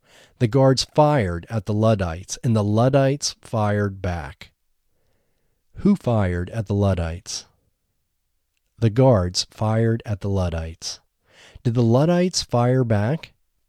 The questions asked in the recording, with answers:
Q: Who fired at the Luddites?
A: The guards fired at the Luddites.

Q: Did the Luddites fire back?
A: Yes, the Luddites fired back.